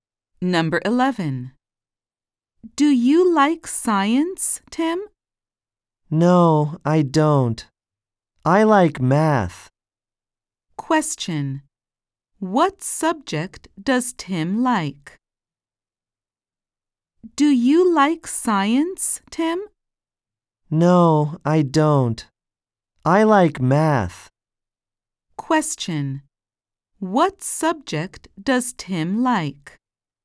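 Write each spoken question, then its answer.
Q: What subject does Tim like?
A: Math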